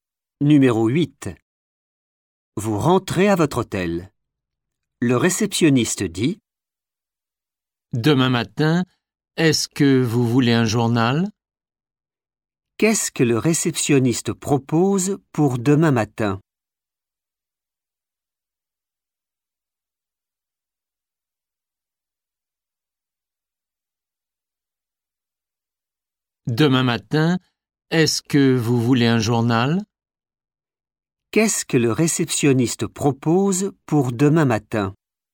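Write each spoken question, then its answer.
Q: Qu'est-ce que le réceptionniste propose pour demain matin ?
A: un journal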